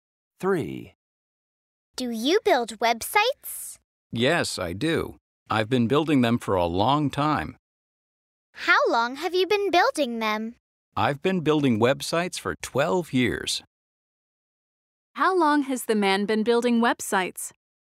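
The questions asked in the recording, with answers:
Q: How long has the man been building websites?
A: For 12 years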